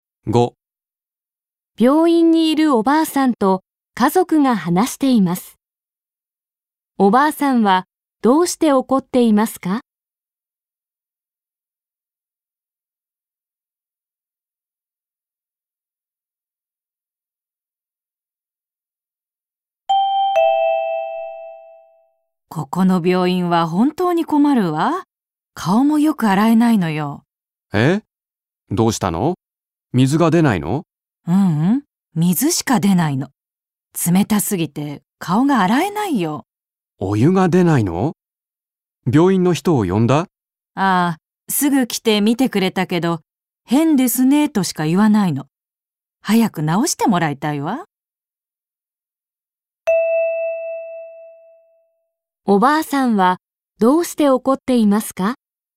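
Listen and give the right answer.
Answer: お湯が出なくて(水しか出なくて)顔が洗えないから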